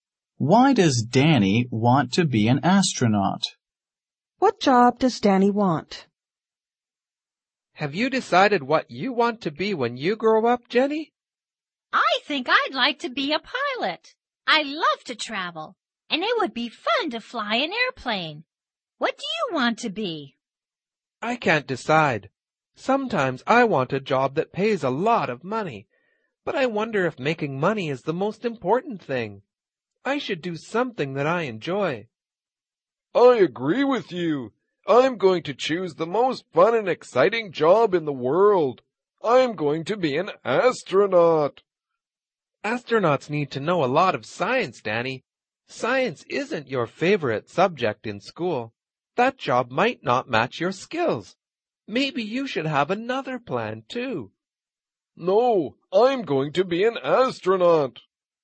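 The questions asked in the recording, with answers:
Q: Why does Danny want to be an astronaut?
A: He thinks it is the most fun and exciting job in the world.

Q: What job does Danny want?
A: Astronaut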